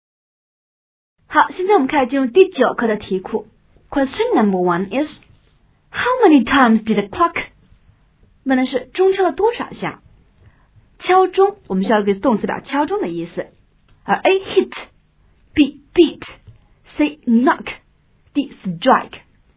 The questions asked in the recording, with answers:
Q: how many times did the clock?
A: 最佳答应该是 D。How many times did the clock strike?